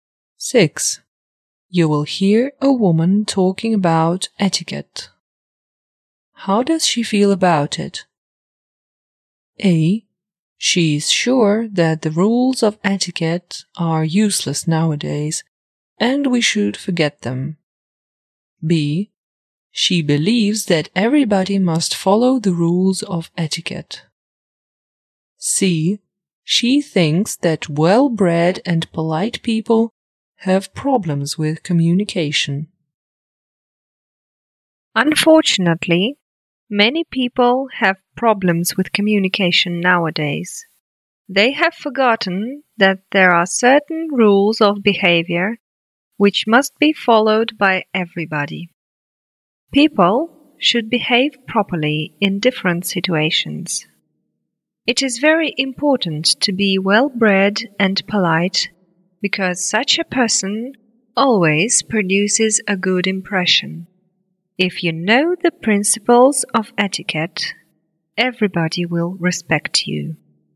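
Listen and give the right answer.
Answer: B: She believes that everybody must follow the rules of etiquette.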